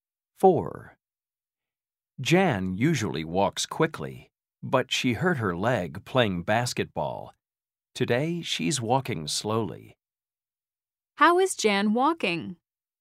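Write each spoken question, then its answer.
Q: How is Jan walking?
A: slowly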